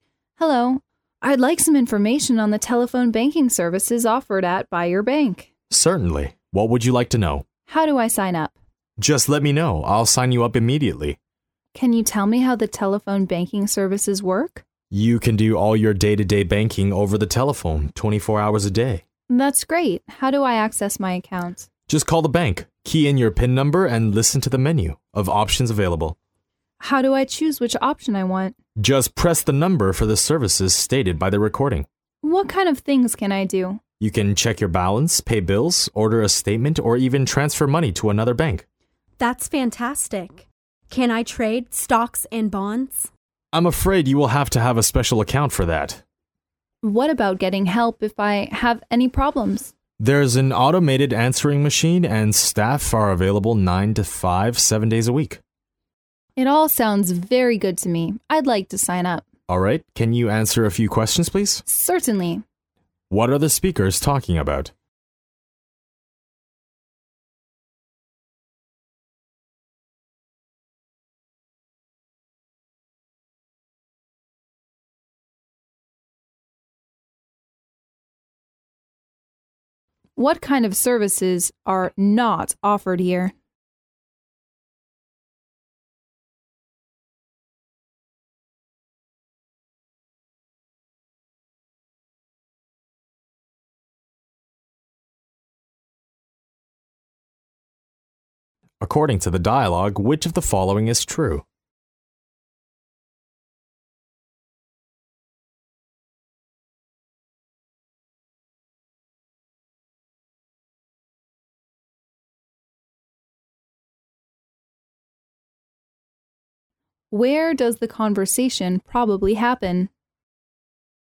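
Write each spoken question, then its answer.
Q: What are the speakers talking about?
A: The bank's telephone banking services

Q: What kind of services are not offered here?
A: Trading stocks and bonds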